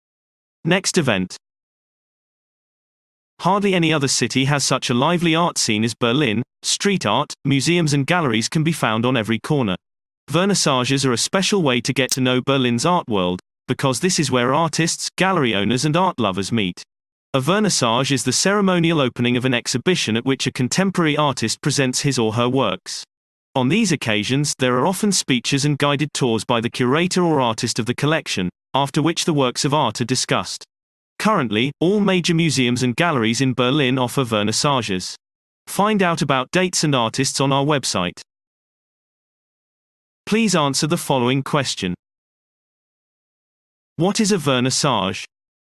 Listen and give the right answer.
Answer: A vernissage is the formal opening of an exhibition at which a contemporary artist presents his or her work.